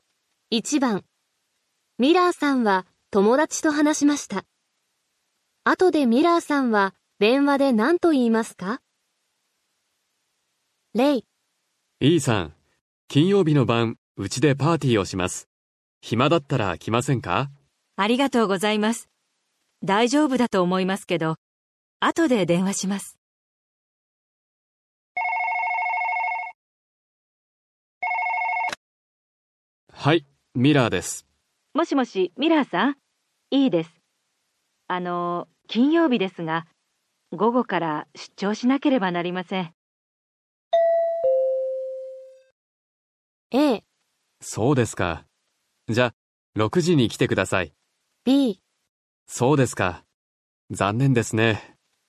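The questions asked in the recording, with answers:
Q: 後でミラーさんは電話で何と言いますか?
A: B: そうですか。残念ですね。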